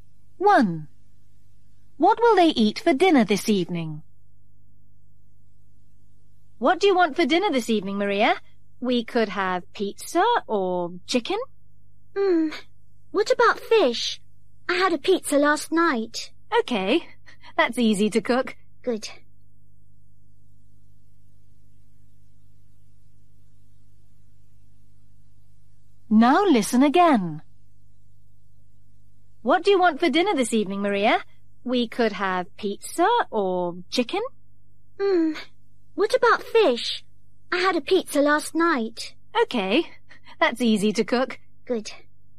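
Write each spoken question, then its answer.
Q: What will they eat for dinner this evening?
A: Fish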